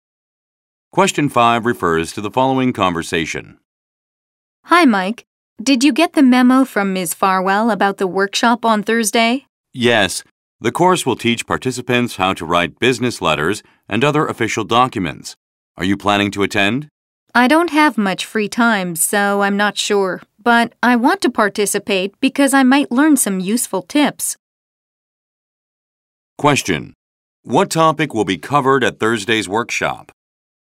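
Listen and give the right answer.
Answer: Writing business letters and other official documents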